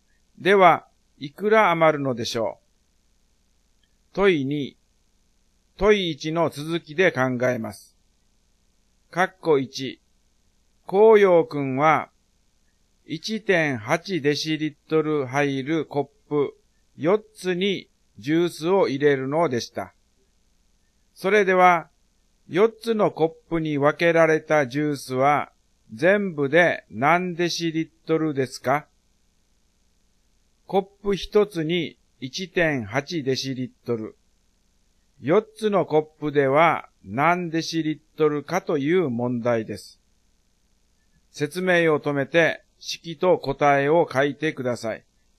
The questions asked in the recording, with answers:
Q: それでは4つのコップに分けられたジュースは全部で何デシリットルですか?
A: 1.8×4 ですね。答えが 7.2 デシリットルです。